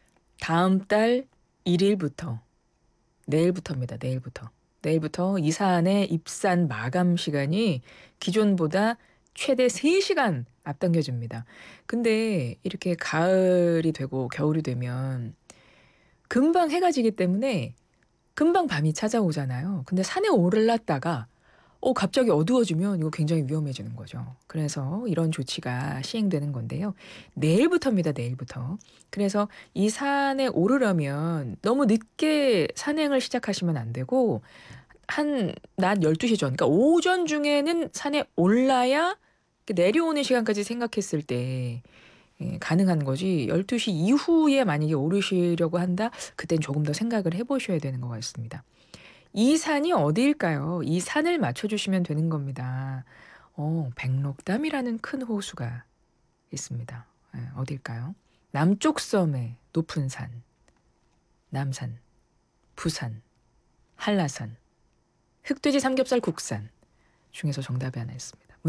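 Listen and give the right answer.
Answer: 한라산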